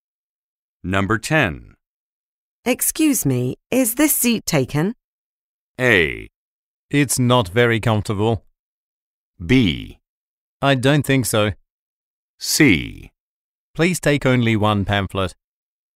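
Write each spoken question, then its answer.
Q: Excuse me, is this seat taken?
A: B: I don't think so.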